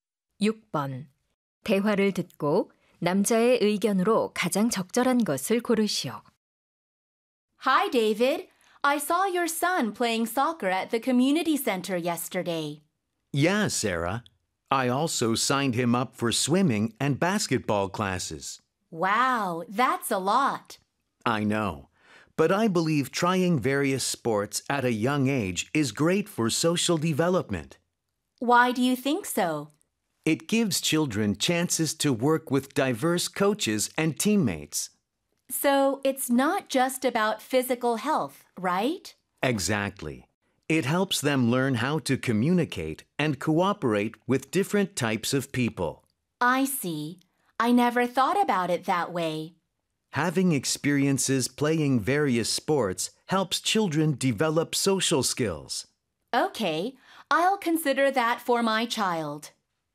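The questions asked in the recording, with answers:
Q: 대화를 듣고 남자의 의견으로 가장 적절한 것을 고르시오.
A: 다양한 스포츠를 경험하는 것은 아이들의 사회성 발달에 도움이 된다.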